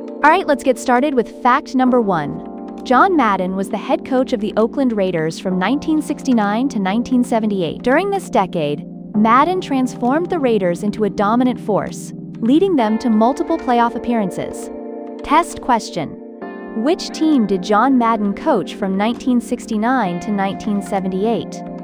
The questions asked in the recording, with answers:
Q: Which team did John Madden coach from 1969 to 1978?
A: Correct answer, Oakland Raiders.